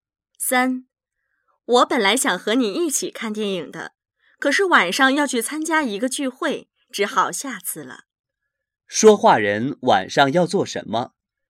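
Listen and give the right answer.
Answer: 去参加一个聚会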